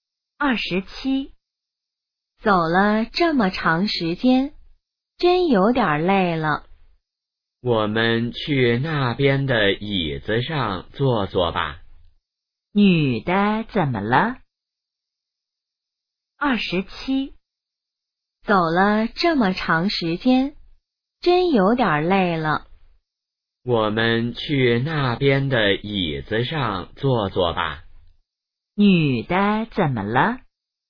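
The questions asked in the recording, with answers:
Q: 女的怎么了?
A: 有点累了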